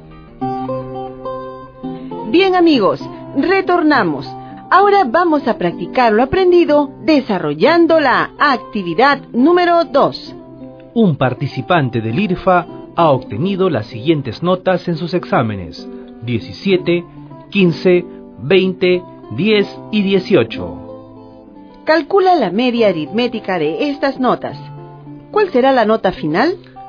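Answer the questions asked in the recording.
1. 16
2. 16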